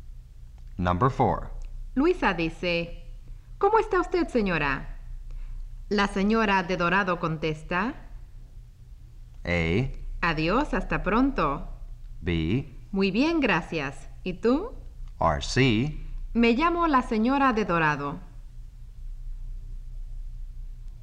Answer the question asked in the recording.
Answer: It's B. When Luisa asks, how are you?